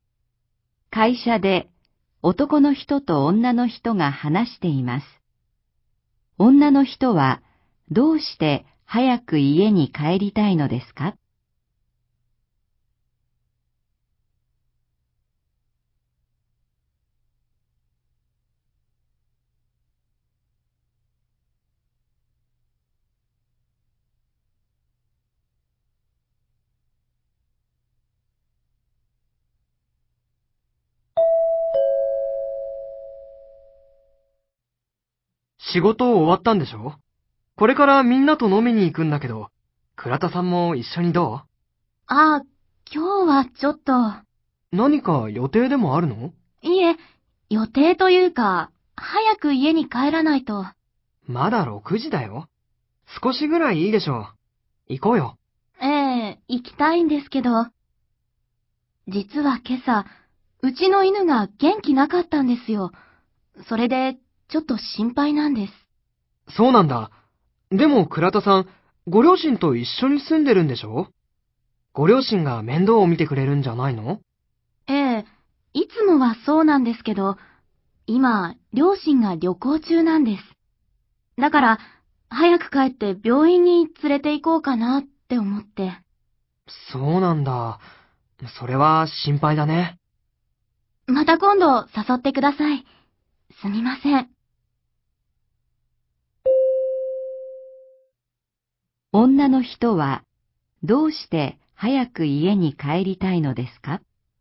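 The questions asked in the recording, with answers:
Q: 女の人はどうして早く家に帰りたいのですか?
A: 犬の元気がないので、病院に連れて行きたいから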